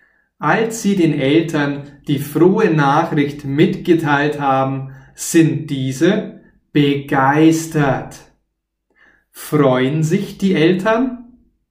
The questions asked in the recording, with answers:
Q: Freuen sich die Eltern?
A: Ja, sie freuen sich. Sie sind sogar begeistert.